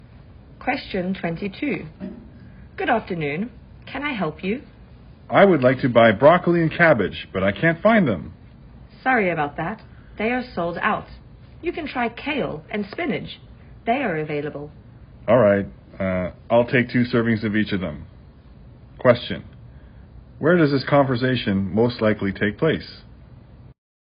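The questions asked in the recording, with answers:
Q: Where does this conversation most likely take place?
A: At a grocery store (vegetable market)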